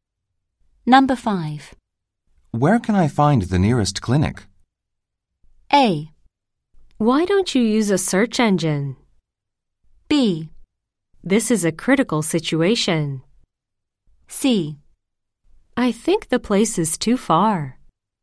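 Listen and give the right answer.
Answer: A: Why don't you use a search engine?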